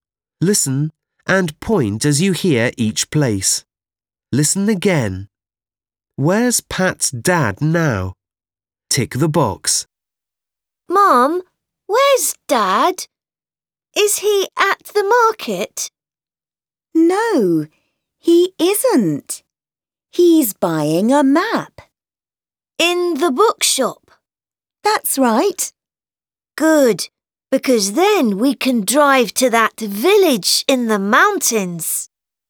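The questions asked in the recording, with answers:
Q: Where's Pat's dad now?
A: In the bookshop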